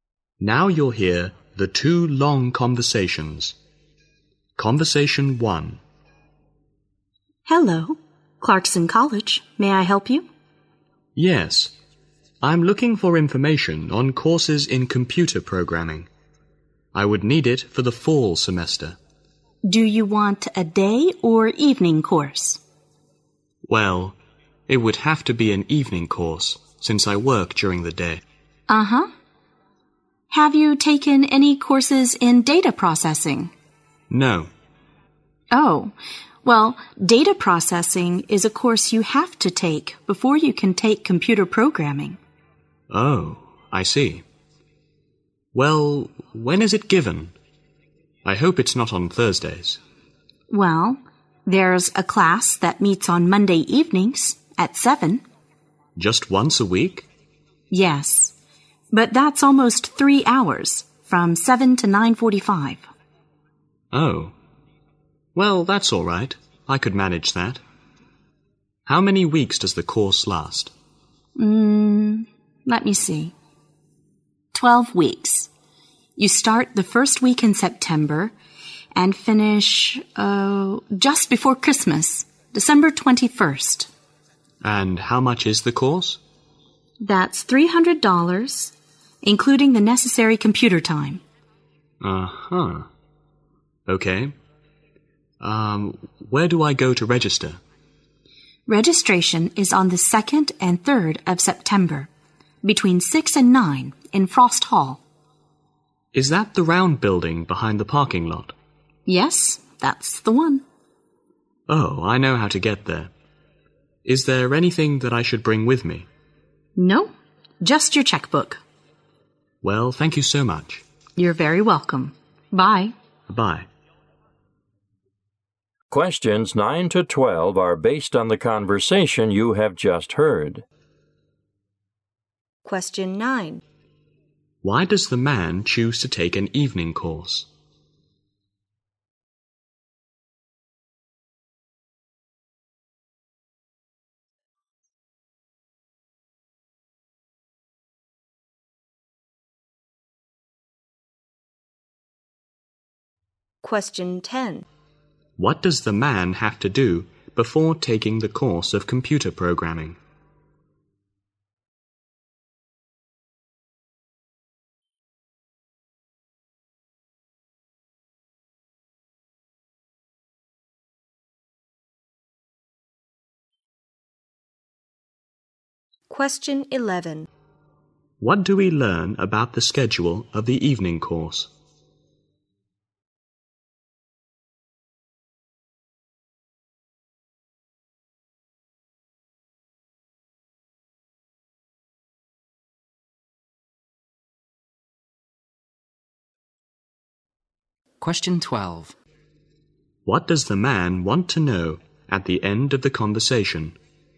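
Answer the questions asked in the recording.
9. He works during the day
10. Take a course in data processing
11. Once a week, Monday 7 to 9:45, for 12 weeks
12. Whether he should bring anything with him to register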